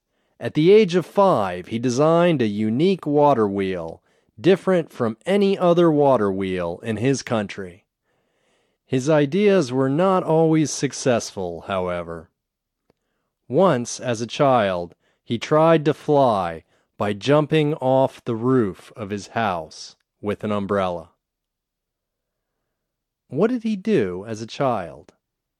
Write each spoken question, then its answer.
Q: What did he do as a child?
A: As a child, he tried to fly by jumping off the roof of his house with an umbrella.